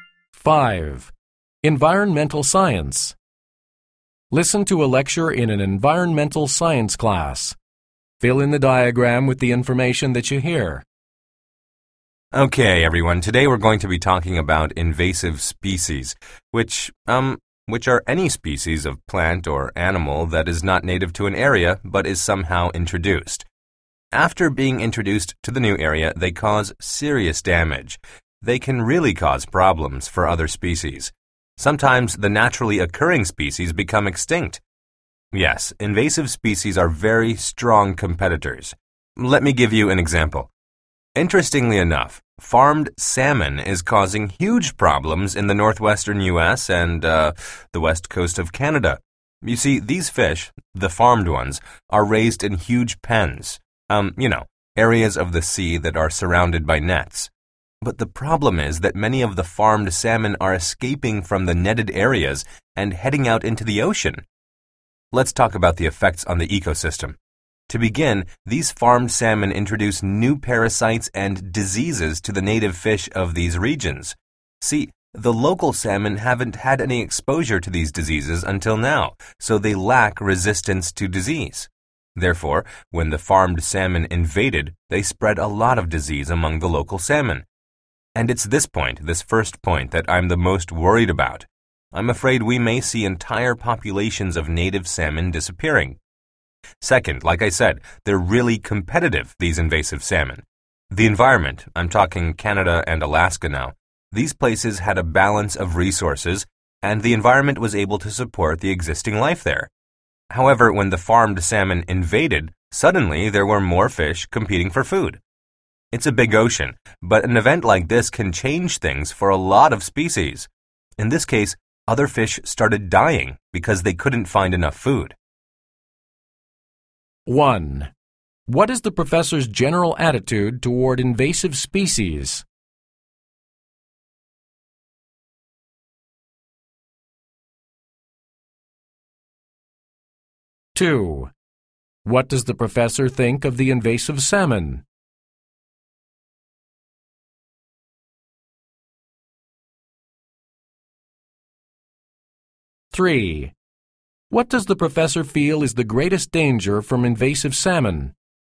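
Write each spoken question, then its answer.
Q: What is the professor's general attitude toward invasive species?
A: Negative; he thinks they cause serious damage to other species

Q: What does the professor feel is the greatest danger from invasive salmon?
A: Spreading new diseases to native salmon, which could wipe out whole native populations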